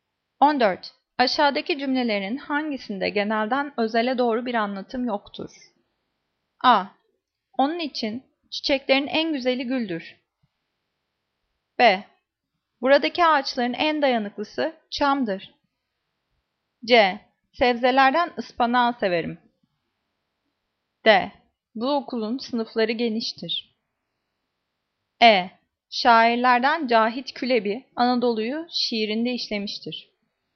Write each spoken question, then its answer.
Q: Aşağıdaki cümlelerin hangisinde genelden özele doğru bir anlatım yoktur?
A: Cevap. D. Bu okulun sınıfları geniştir.